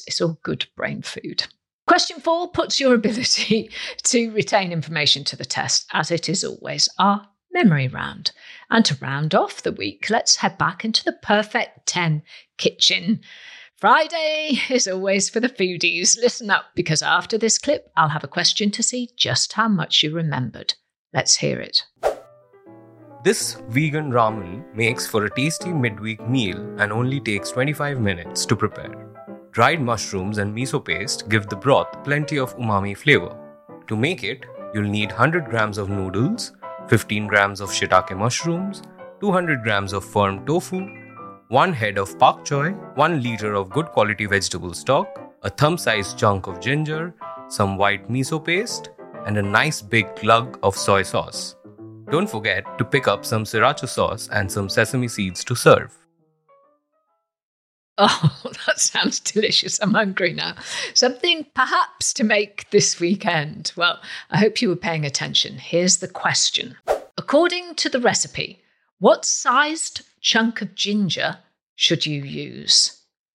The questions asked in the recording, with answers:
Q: According to the recipe, what sized chunk of ginger should you use?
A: And the answer I was looking for was a thumb sized piece of ginger.